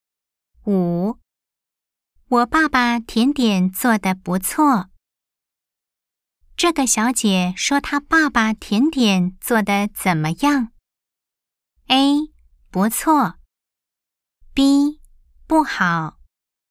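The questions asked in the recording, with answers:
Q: 这个小姐说她爸爸甜点做得怎么样?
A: A: 不错。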